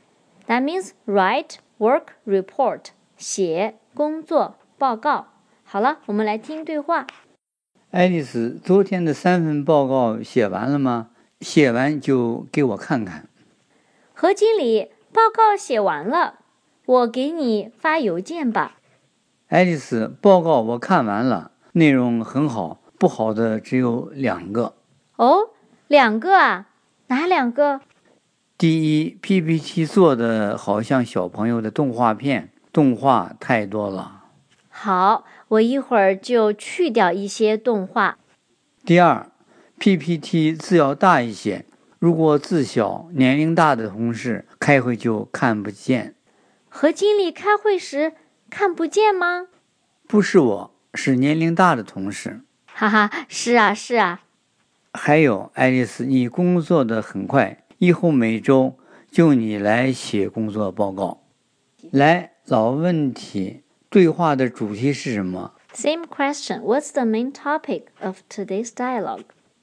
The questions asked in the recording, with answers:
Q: 来,老问题,对话的主题是什么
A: 和经理在评价爱丽丝写的报告。